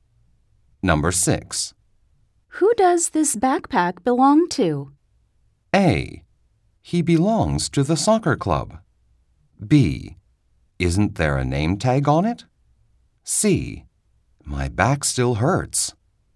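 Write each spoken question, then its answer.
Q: Who does this backpack belong to?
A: B: Isn't there a name tag on it?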